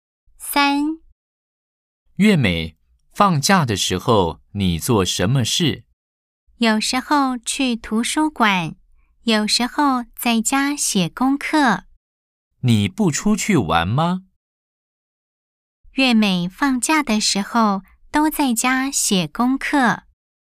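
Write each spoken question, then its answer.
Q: 月美放假的时候都在家写功课。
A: X (false)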